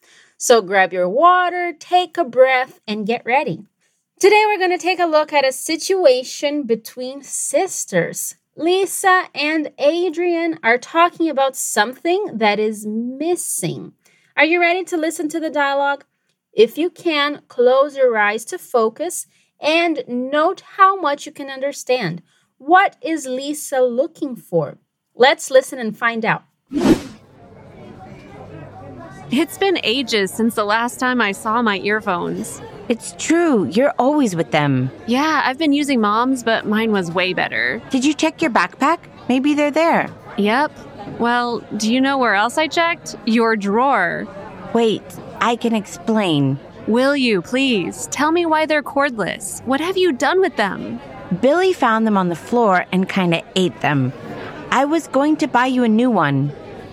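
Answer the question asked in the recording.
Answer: Her earphones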